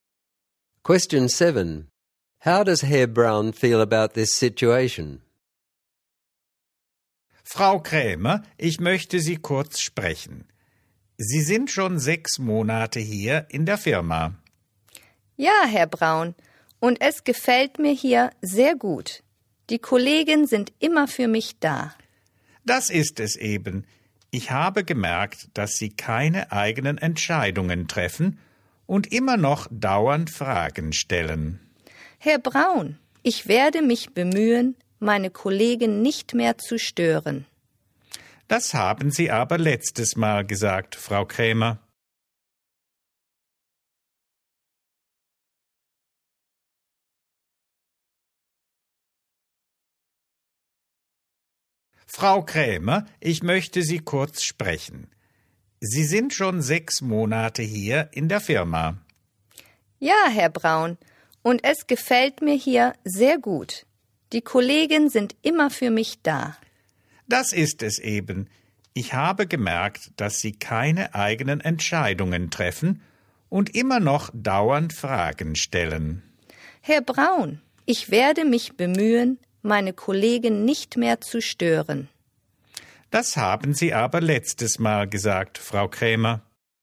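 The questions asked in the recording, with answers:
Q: How does Herr Braun feel about this situation?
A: Frustrated/annoyed: she still doesn't make her own decisions and keeps asking questions despite earlier promises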